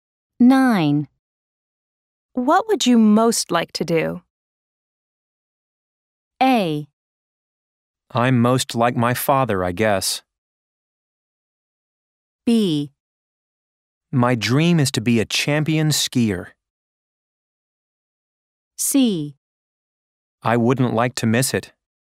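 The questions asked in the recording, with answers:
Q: What would you most like to do?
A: B: My dream is to be a champion skier.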